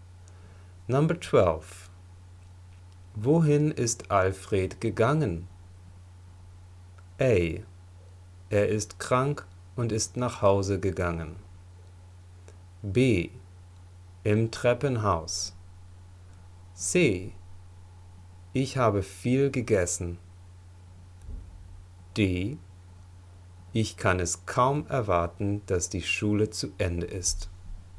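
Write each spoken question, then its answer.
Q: Wohin ist Alfred gegangen?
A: A: Er ist krank und ist nach Hause gegangen.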